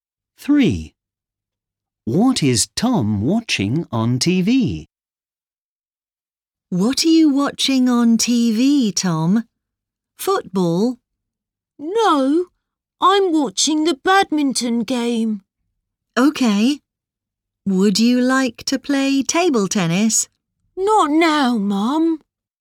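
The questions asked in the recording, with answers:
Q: What is Tom watching on TV?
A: a badminton game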